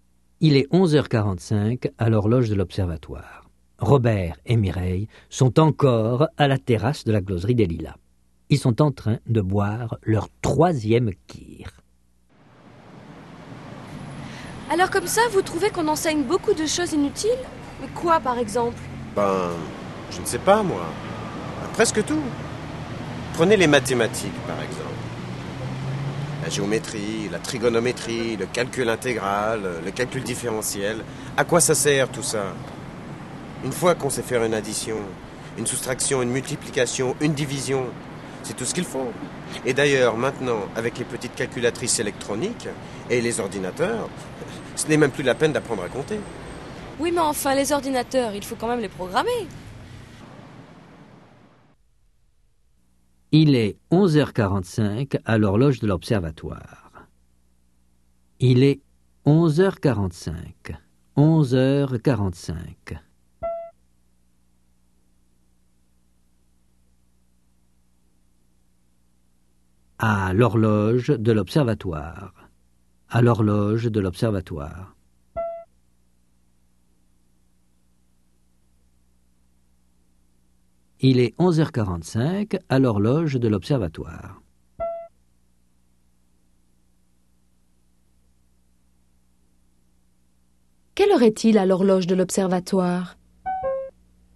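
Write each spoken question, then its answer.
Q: Quelle heure est-il à l'horloge de l'observatoire?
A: Il est 11h45.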